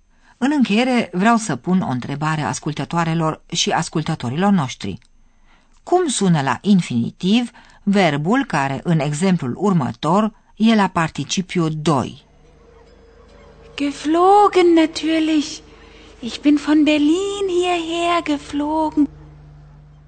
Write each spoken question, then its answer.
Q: Cum sună la infinitiv verbul care, în exemplul următor, e la participiu 2?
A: Infinitivul este așadar fliegen, a zbura.